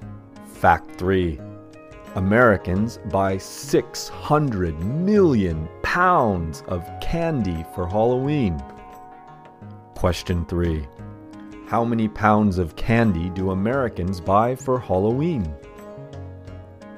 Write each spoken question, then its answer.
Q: how many pounds of candy do Americans buy for Halloween?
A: Americans buy 600 million pounds of candy